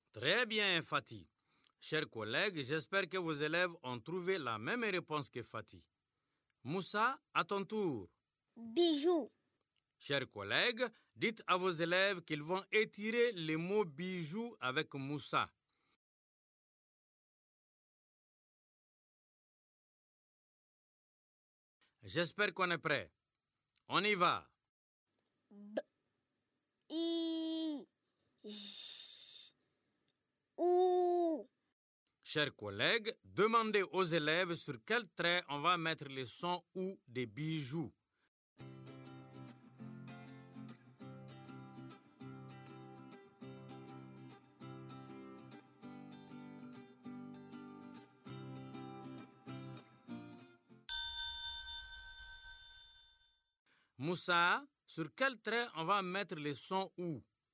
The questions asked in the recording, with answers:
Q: Moussa, sur quel trait on va mettre le son « ou »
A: Monsieur, on va mettre le son « ou » sur le quatrième trait.